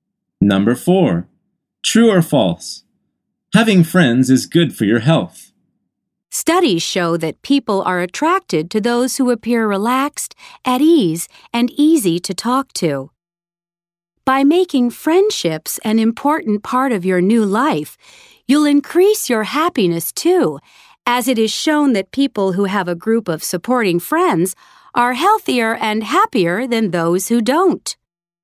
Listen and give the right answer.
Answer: The answer is true.